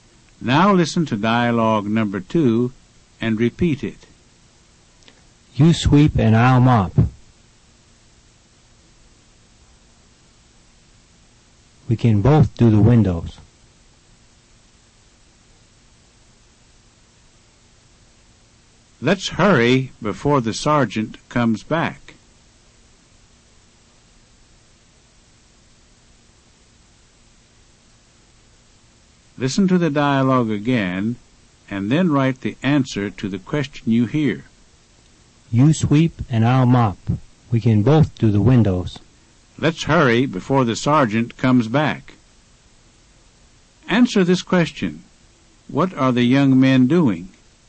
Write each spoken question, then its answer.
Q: What are the young men doing?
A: They're cleaning the barracks.